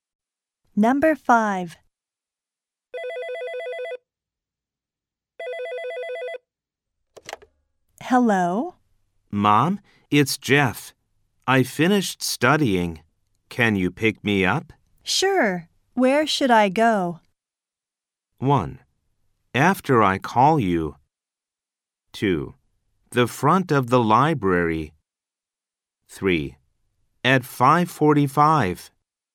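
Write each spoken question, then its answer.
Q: Sure. Where should I go?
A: 2: The front of the library.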